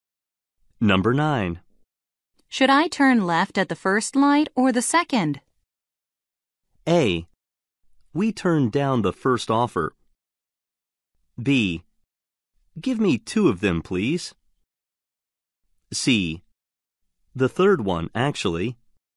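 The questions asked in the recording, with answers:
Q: Should I turn left at the first light or the second?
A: C: The third one, actually.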